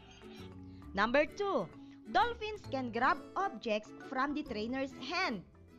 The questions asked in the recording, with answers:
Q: Dolphins can grab objects from the trainer's hand.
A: Exactly! It is a fact again.